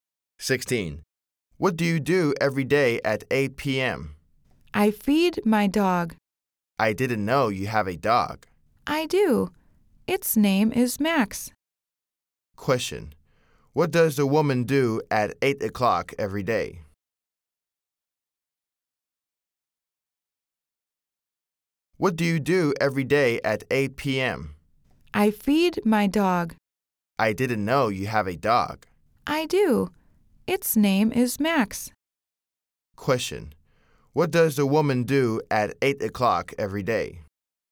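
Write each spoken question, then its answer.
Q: Question: What does the woman do at 8 o'clock every day?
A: She feeds her dog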